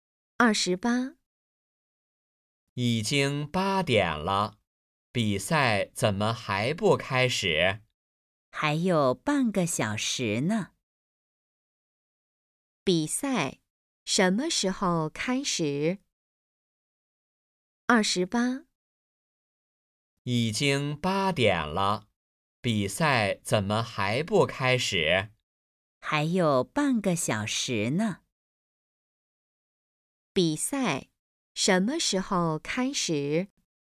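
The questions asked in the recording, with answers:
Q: 比赛什么时候开始?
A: 8点半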